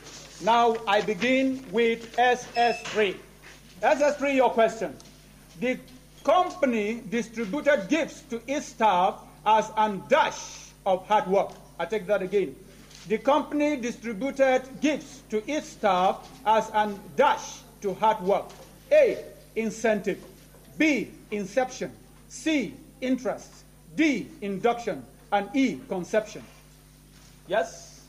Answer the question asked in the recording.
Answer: Incentive! That is the correct answer.